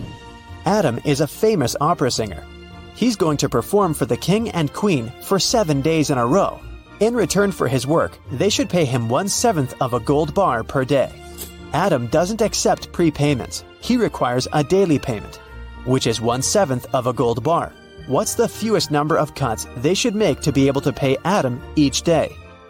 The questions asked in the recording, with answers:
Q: What's the fewest number of cuts they should make to be able to pay Adam each day?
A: Just 2.